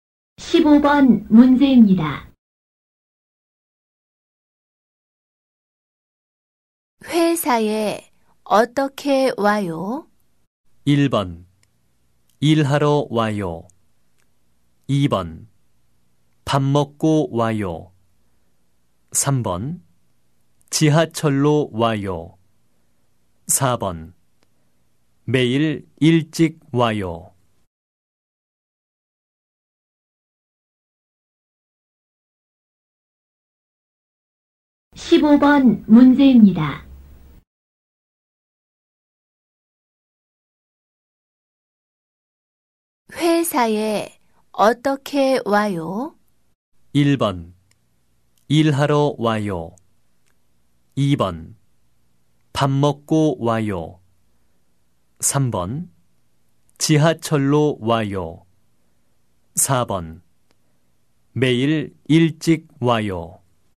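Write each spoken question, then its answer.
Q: 회사에 어떻게 와요?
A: 3: 지하철로 와요.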